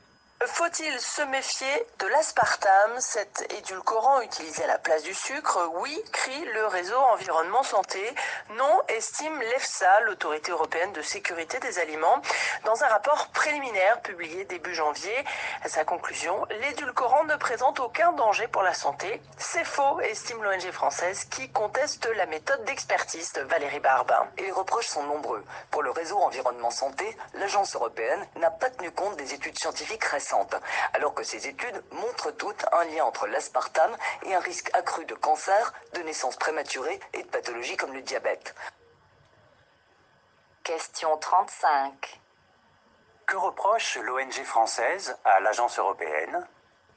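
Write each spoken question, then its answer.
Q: Que reproche l'ONG française à l'agence européenne ?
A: De ne pas avoir tenu compte des études scientifiques récentes (méthode d'expertise contestée).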